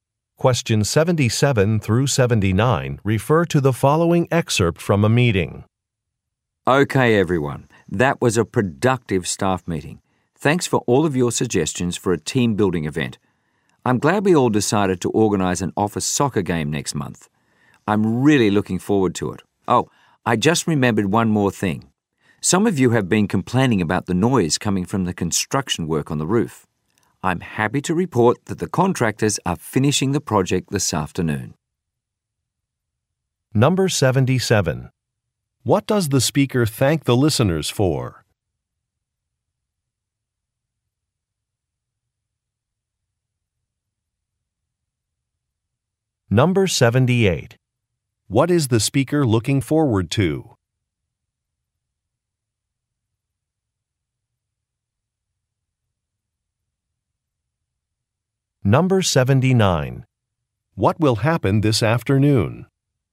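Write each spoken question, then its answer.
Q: What does the speaker thank the listeners for?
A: Their suggestions for a team-building event

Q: What is the speaker looking forward to?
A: An office soccer game

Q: What will happen this afternoon?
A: The roof construction work will be finished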